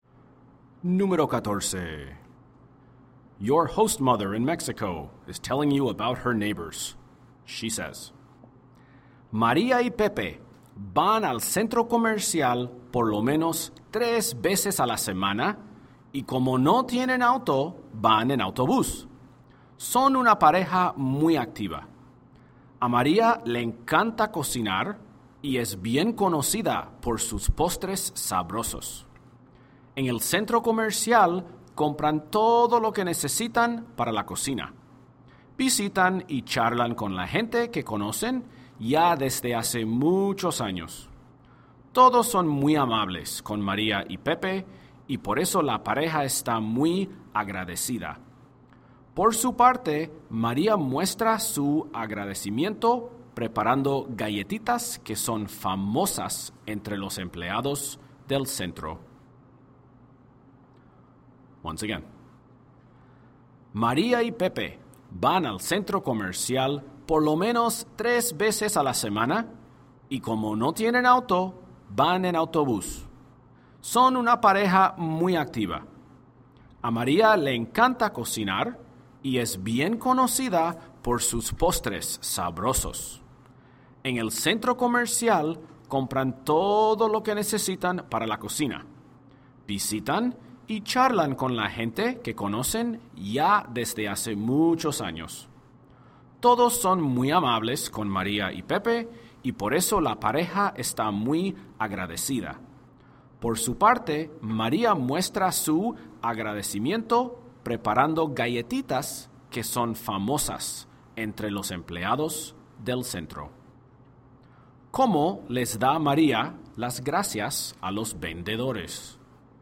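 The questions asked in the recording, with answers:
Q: ¿Cómo les da María las gracias a los vendedores?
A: Les prepara galletitas.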